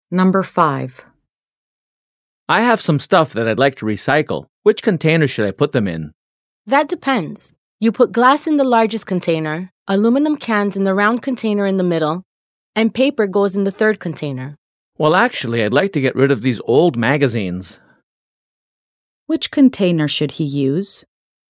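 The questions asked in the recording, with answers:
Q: Which container should he use?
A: The third container (for paper)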